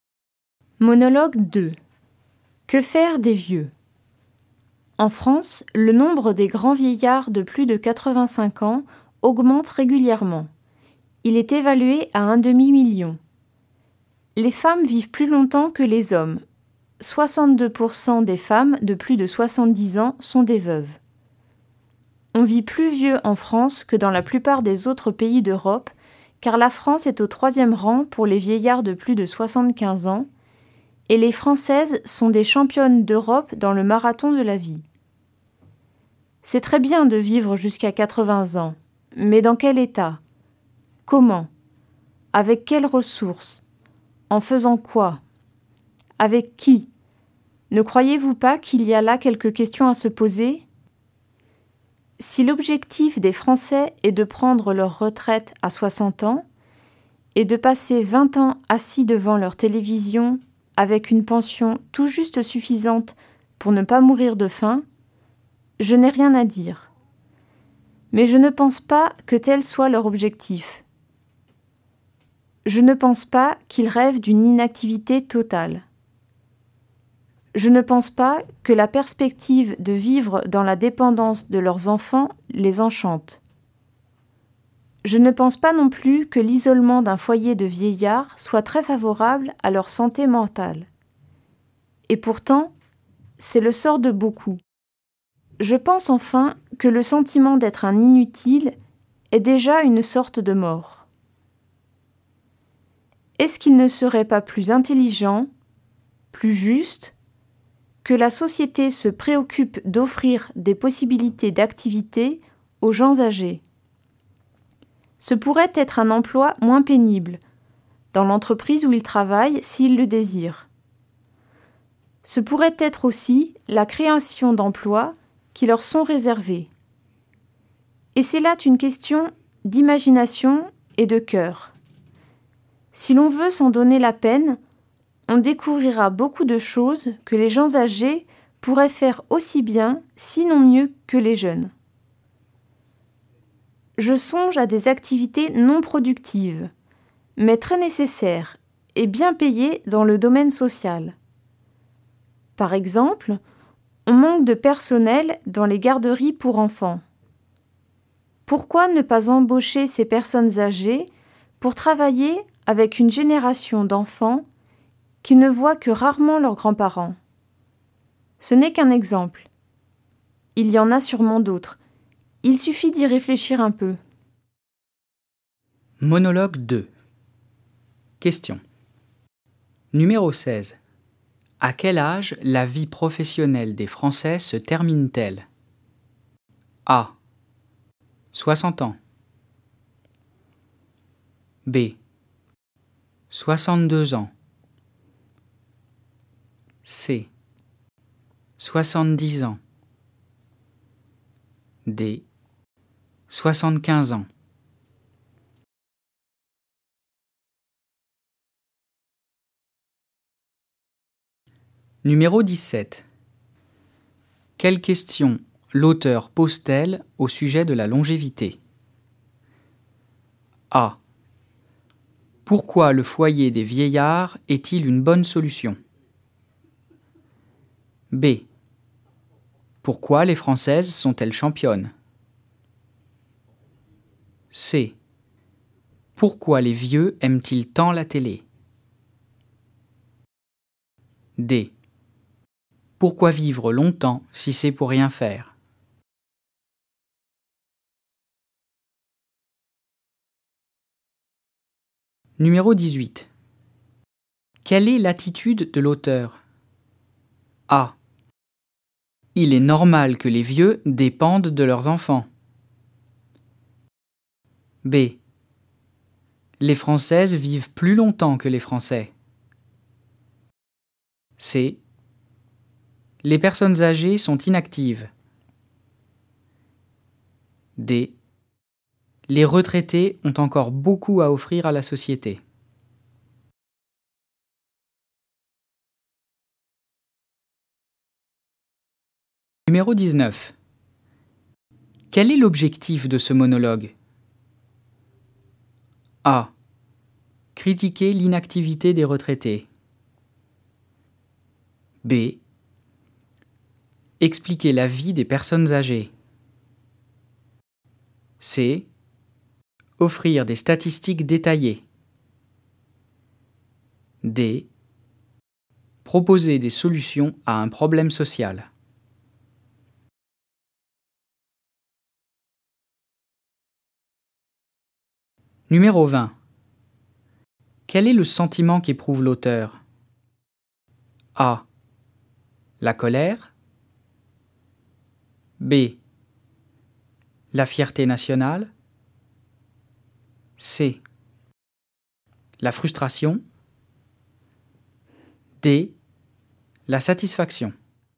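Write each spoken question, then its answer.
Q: À quel âge la vie professionnelle des Français se termine-t-elle?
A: A: 60 ans.

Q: Quelles questions l'auteur pose-t-elle au sujet de la longévité?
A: D: Pourquoi vivre longtemps si c'est pour rien faire?

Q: Quelle est l'attitude de l'auteur?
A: D: Les retraités ont encore beaucoup à offrir à la société.

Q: Quel est l'objectif de ce monologue?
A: D: Proposer des solutions à un problème social.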